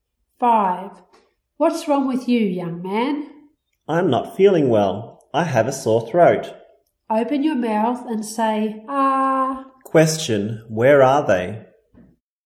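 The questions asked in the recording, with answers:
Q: where are they?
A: At a doctor's office / hospital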